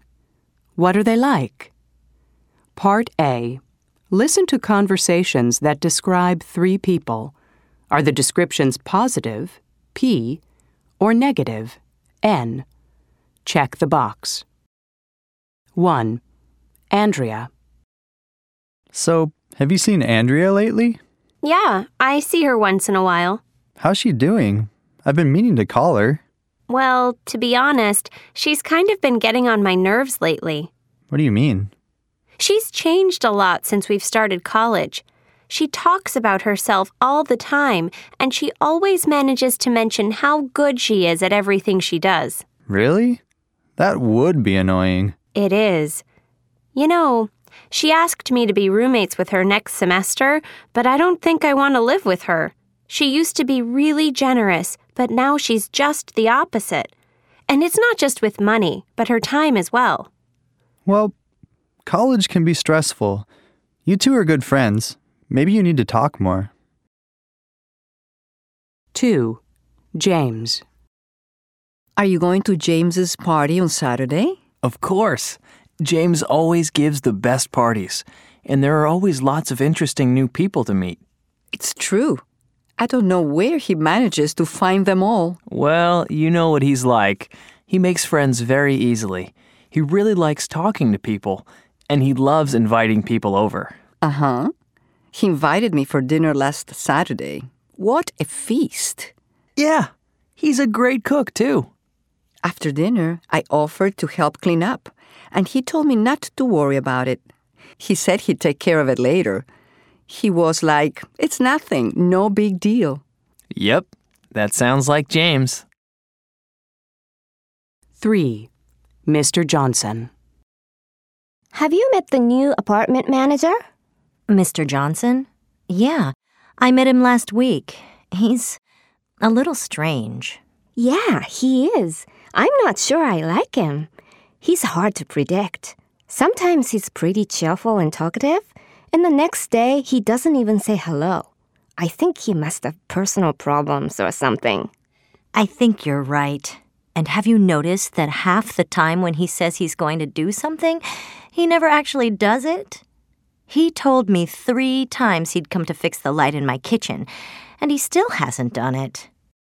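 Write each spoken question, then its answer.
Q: Andrea.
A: N: negative

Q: James.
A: P: positive

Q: Mr. Johnson.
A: N: negative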